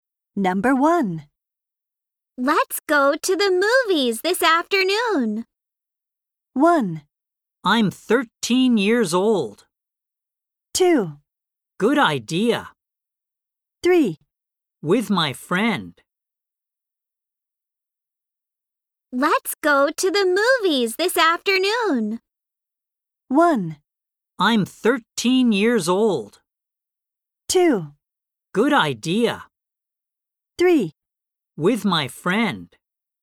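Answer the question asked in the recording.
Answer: 2: Good idea.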